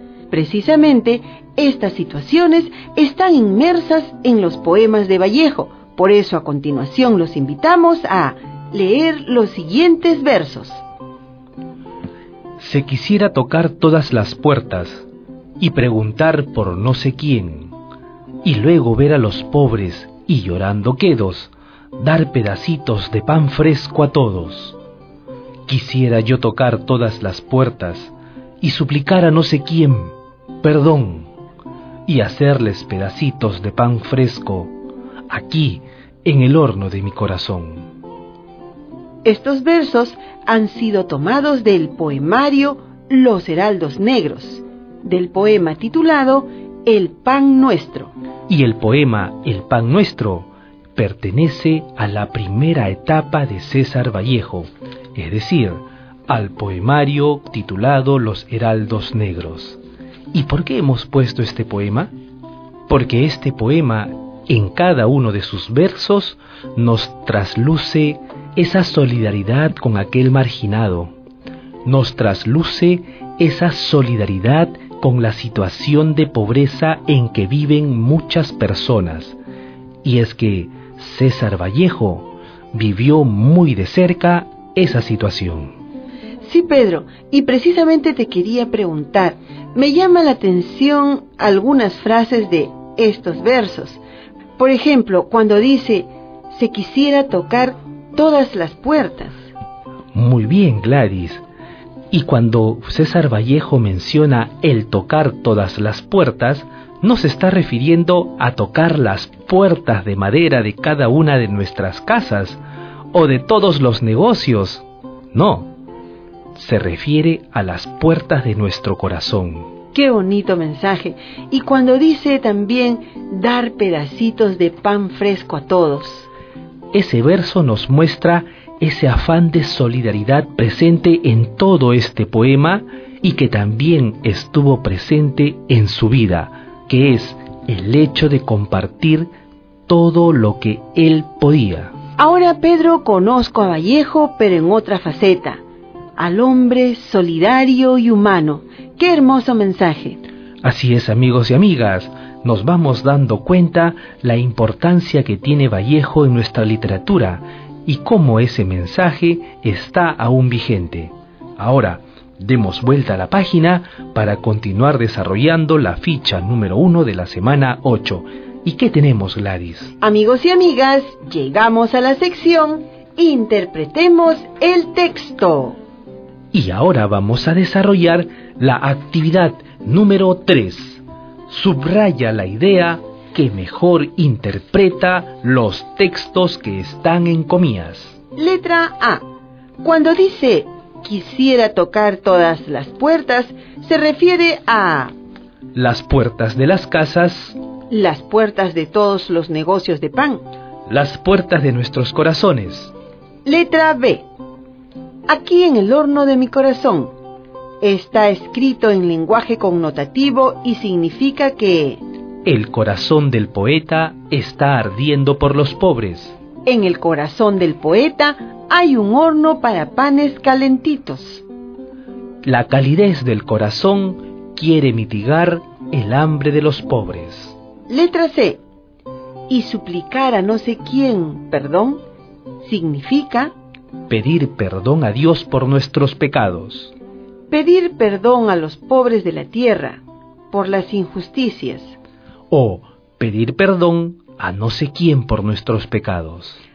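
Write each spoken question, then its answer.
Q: Letra A. Cuando dice quisiera tocar todas las puertas, se refiere a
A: las puertas de nuestros corazones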